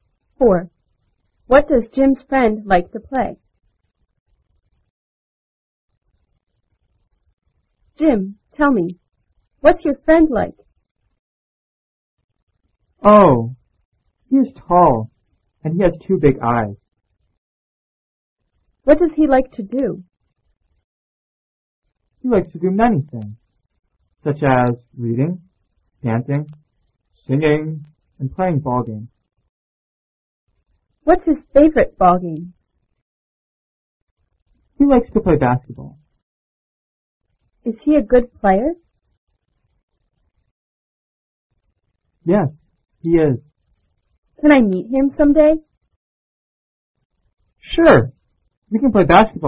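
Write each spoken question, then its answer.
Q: What does Jim's friend like to play?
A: Basketball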